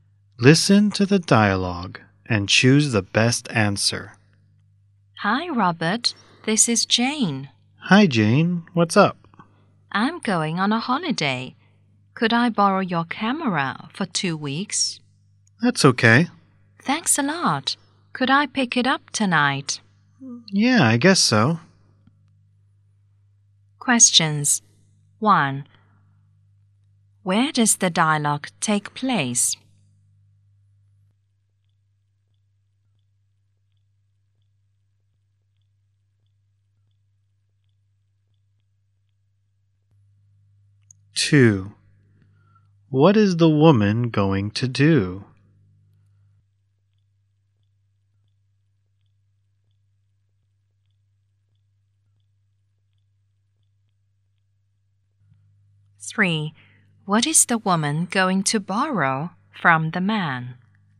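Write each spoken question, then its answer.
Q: What is the woman going to do?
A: Go on a holiday.

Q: What is the woman going to borrow from the man?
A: A camera.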